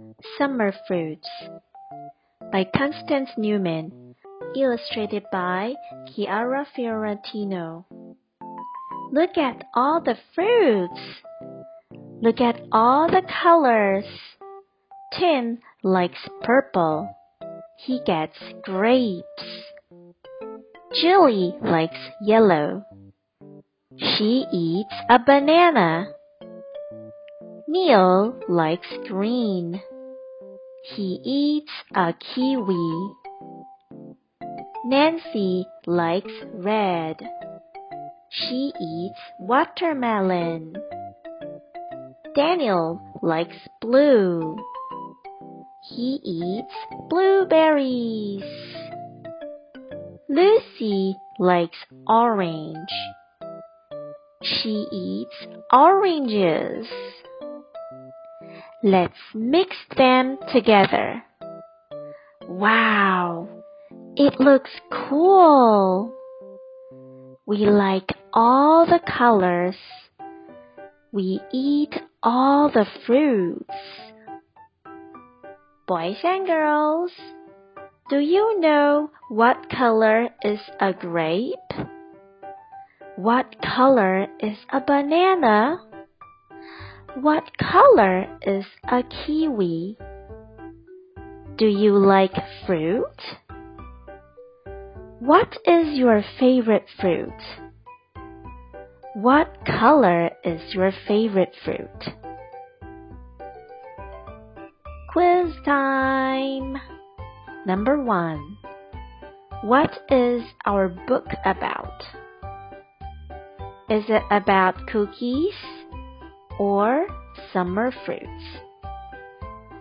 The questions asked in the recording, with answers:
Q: What is our book about? Is it about cookies or summer fruits?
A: The answer is summer fruits.